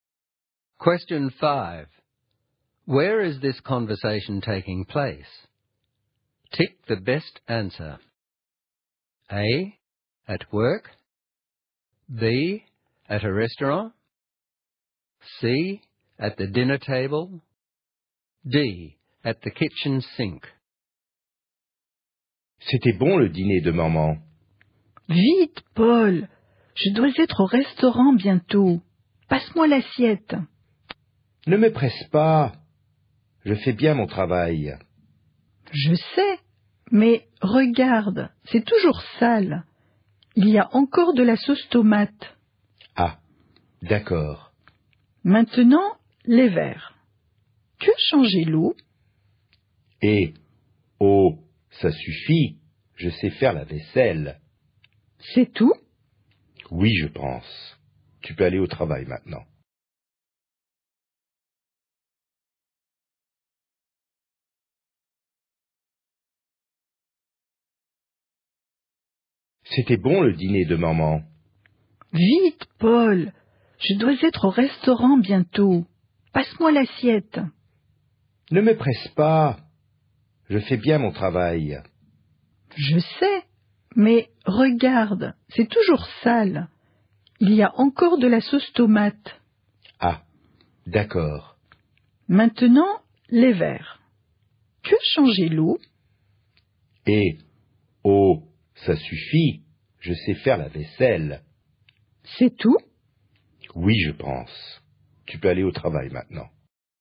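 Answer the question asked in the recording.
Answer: D: At the kitchen sink.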